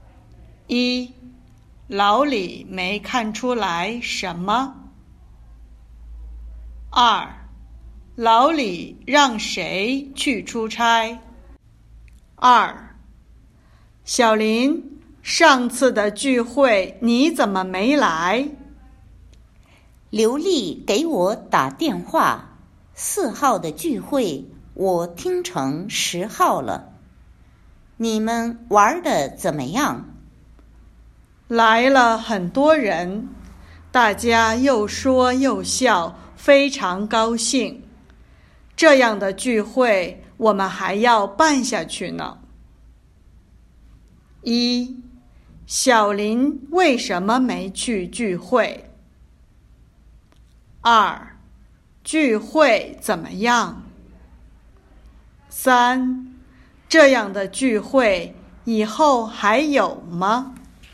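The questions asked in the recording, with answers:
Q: 小林为什么没去聚会?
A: 把四号的聚会听成十号了

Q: 聚会怎么样?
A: 来了很多人,大家非常高兴

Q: 这样的聚会以后还有吗?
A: 有,还要办下去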